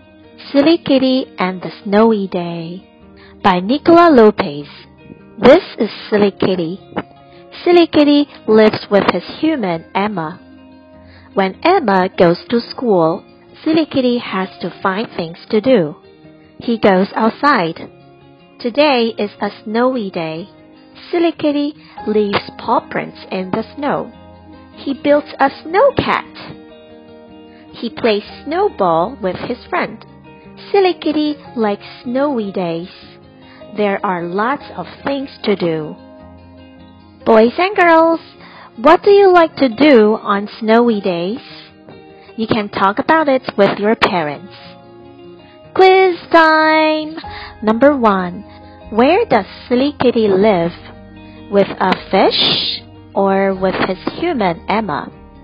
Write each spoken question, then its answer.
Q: Where does Silly Kitty live?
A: That's right, with his human Emma.